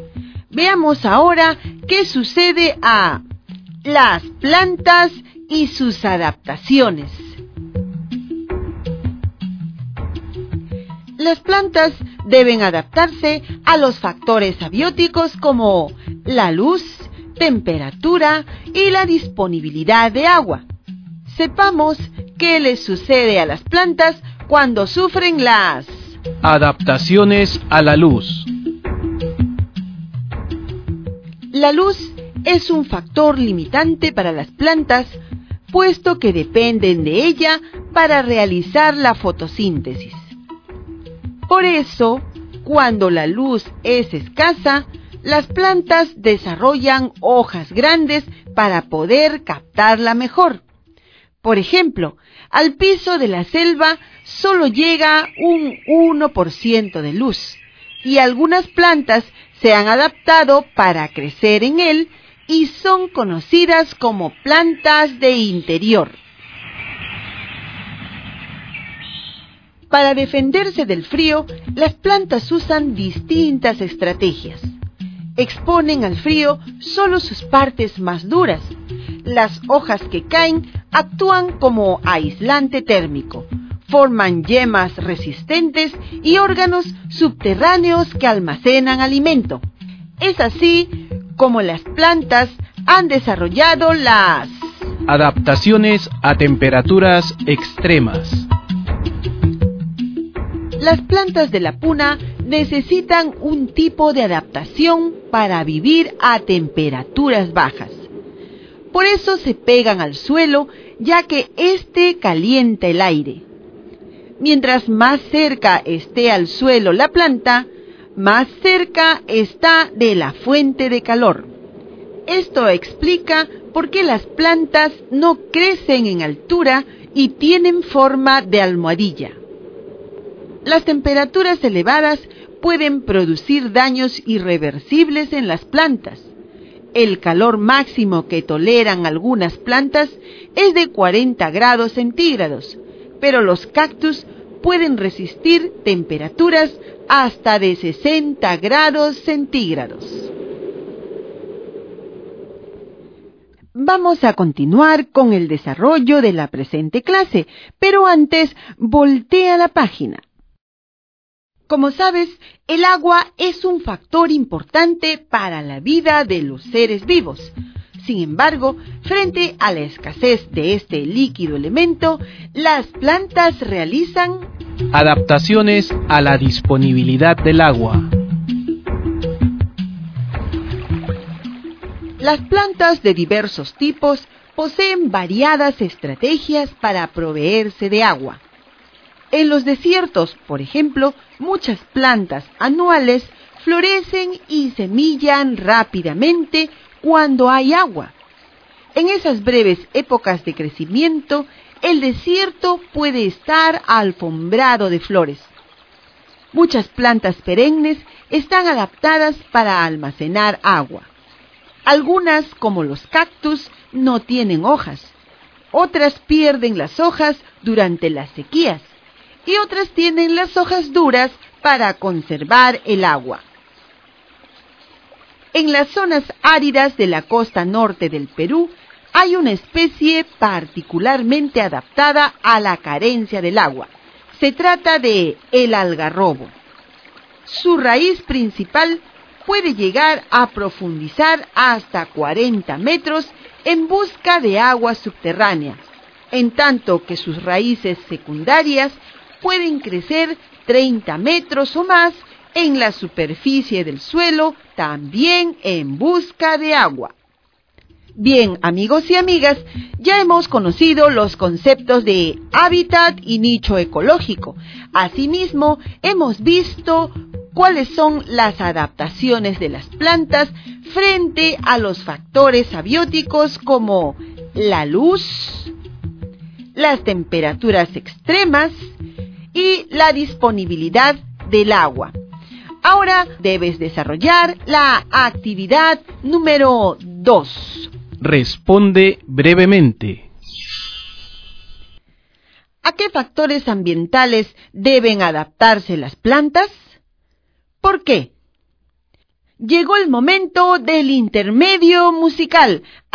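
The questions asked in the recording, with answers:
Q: ¿A qué factores ambientales deben adaptarse las plantas?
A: A la luz, a las temperaturas extremas y a la disponibilidad de agua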